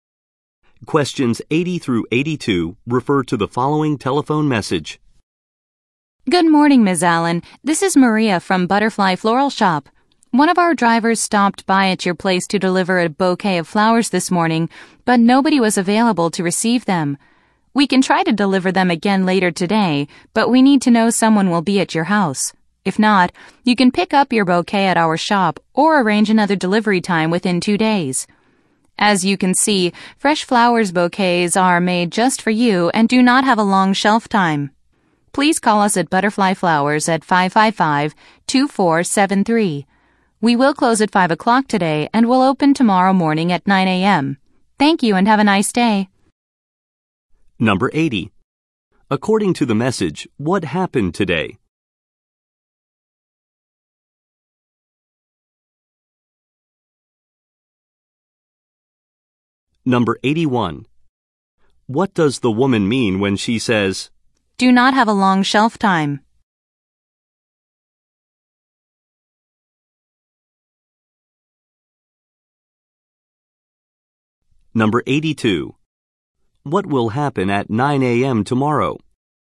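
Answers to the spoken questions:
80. A flower delivery failed because nobody was there to receive it
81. The flowers will not stay fresh for long
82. The shop will open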